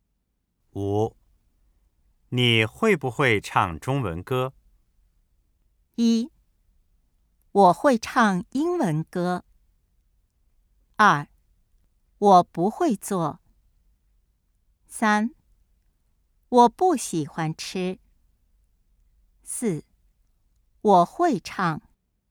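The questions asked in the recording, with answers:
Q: 你会不会唱中文歌?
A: 四: 我会唱。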